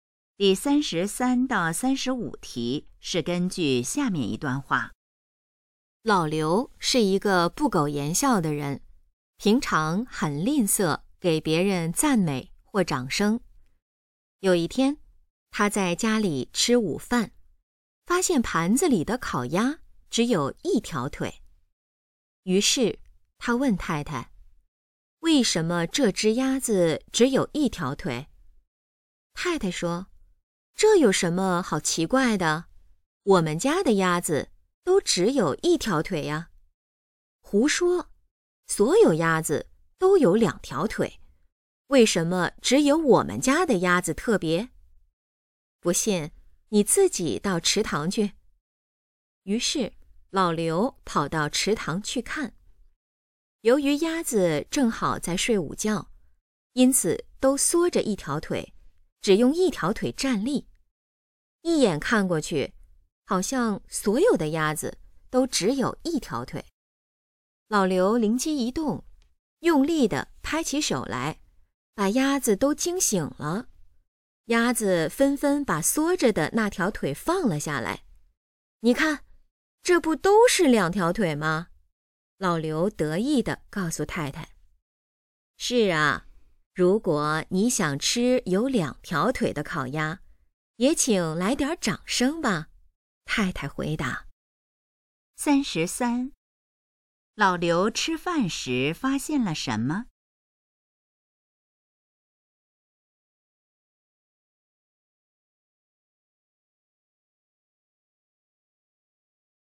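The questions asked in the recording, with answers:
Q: 老刘吃饭时发现了什么?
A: 盘子里的烤鸭只有一条腿

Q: 看到那些鸭子,老刘做了什么?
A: 用力地拍手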